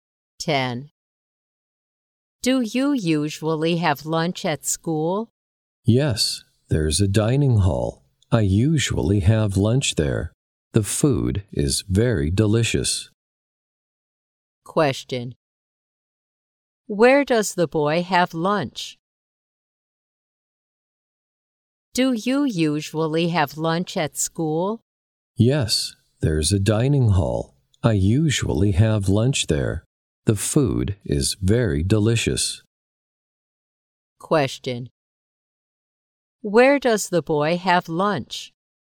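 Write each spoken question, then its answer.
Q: Where does the boy have lunch?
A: In the school dining hall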